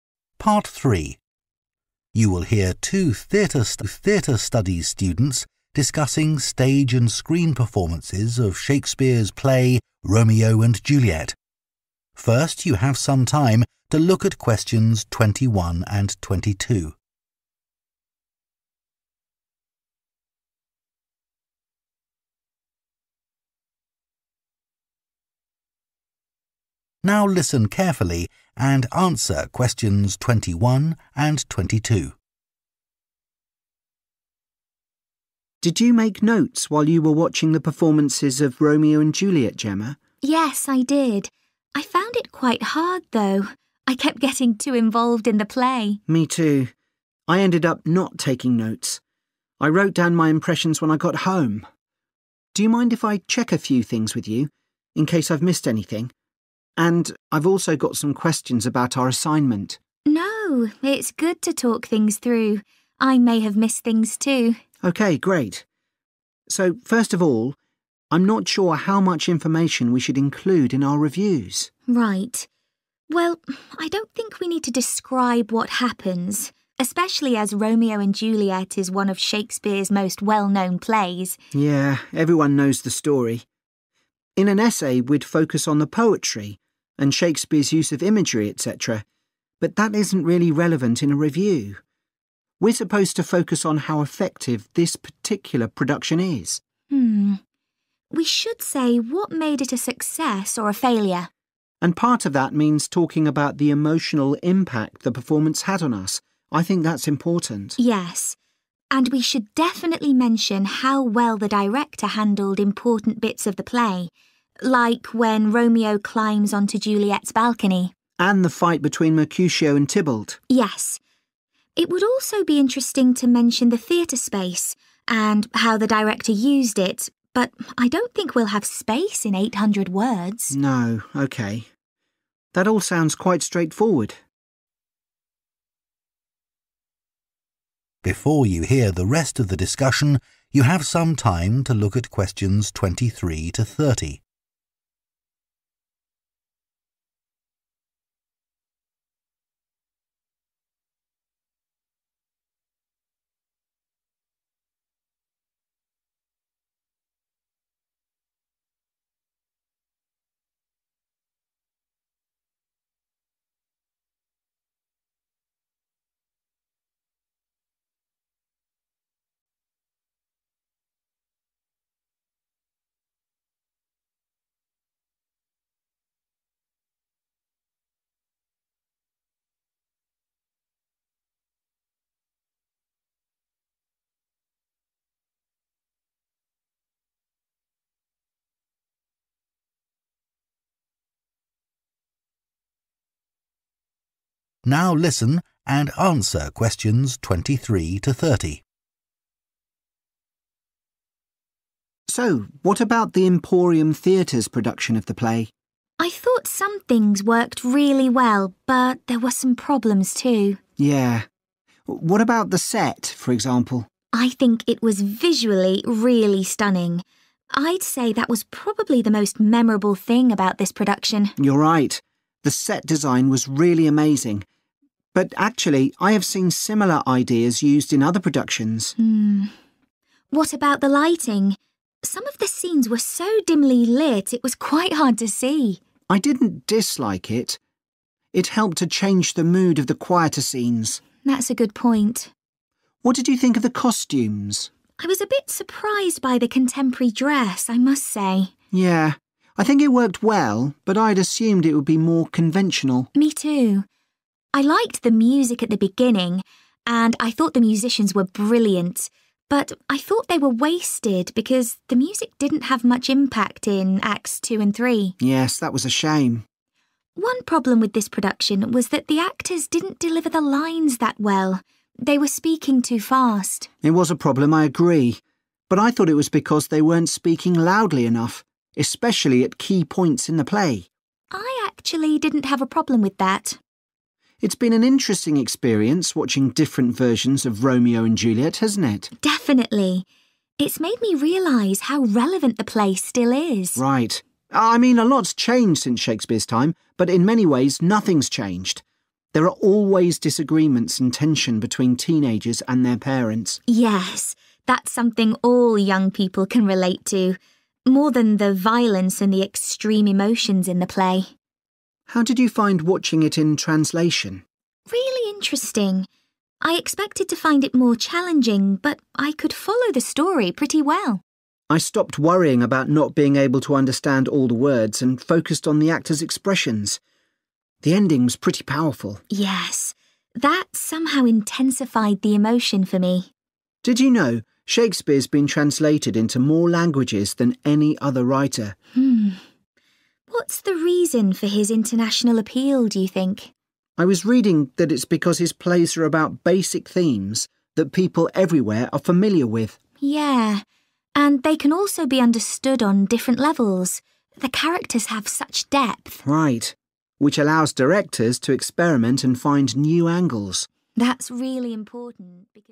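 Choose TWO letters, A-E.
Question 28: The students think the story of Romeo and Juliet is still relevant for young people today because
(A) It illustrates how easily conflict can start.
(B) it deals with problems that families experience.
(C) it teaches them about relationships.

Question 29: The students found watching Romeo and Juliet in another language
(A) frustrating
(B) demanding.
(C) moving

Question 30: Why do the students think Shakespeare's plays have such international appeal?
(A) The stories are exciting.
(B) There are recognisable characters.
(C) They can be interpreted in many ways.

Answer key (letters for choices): 28B, 29C, 30C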